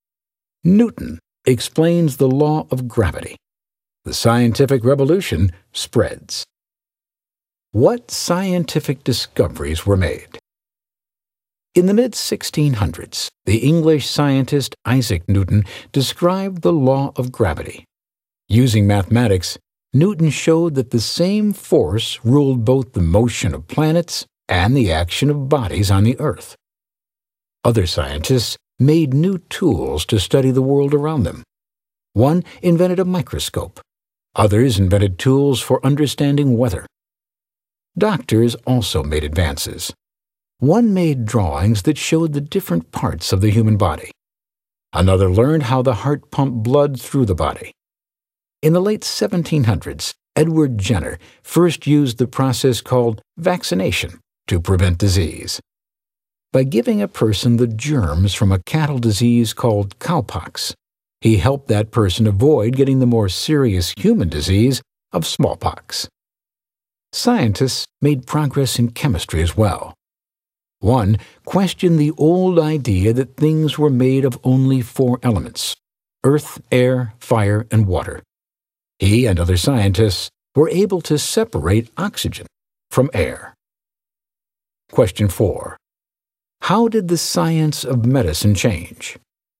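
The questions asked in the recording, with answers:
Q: How did the science of medicine change?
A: Drawings of the body's parts, discovery of how the heart pumps blood, and Jenner's smallpox vaccination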